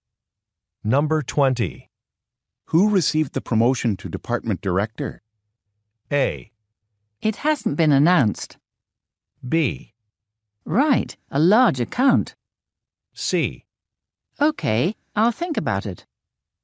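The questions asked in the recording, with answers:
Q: Who received the promotion to department director?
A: A: It hasn't been announced.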